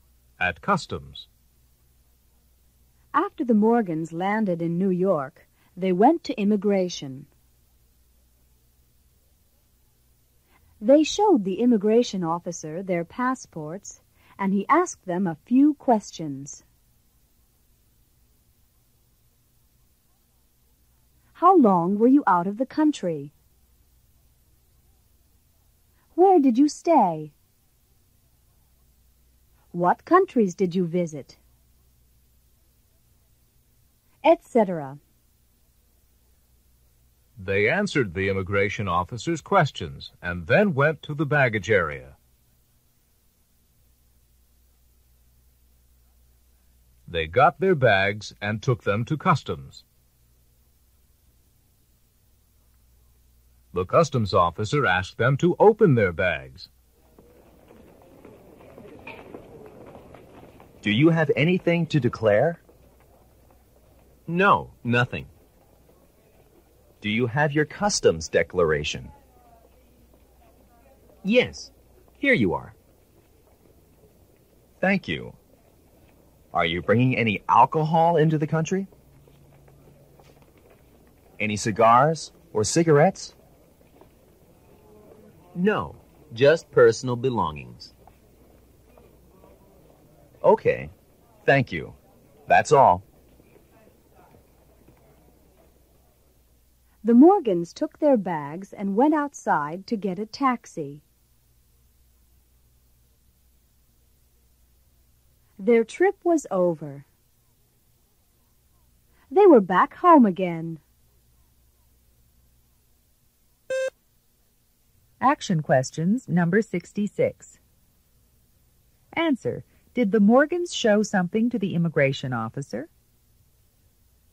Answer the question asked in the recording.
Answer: Yes, they did.